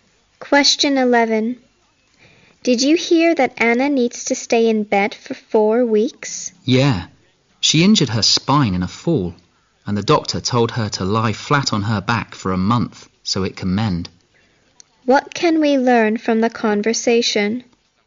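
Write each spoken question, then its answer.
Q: What can we learn from the conversation?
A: Anna injured her spine in a fall and must lie in bed for a month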